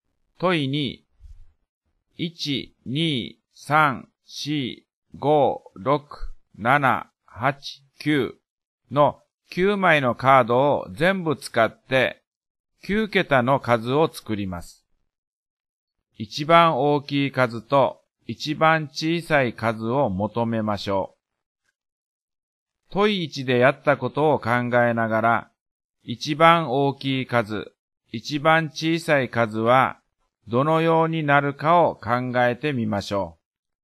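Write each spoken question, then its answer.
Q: 一番大きい数と一番小さい数を求めましょう。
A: 一番大きい数は987654321、一番小さい数は123456789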